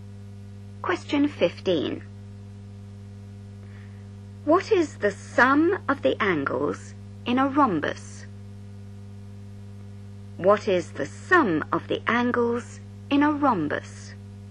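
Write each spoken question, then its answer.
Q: What is the sum of the angles in a rhombus?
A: 360 degrees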